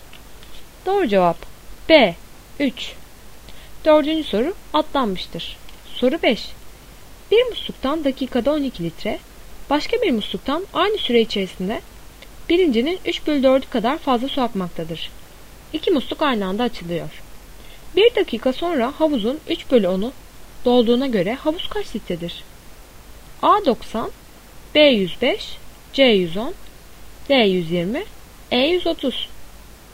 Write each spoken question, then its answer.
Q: Bir dakika sonra havuzun 3 bölü 10'u dolduğuna göre havuz kaç litredir?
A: Doğru cevap C 110.